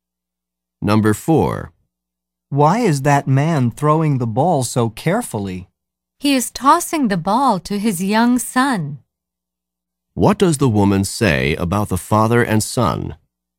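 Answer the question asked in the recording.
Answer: The father is tossing the ball to his young son.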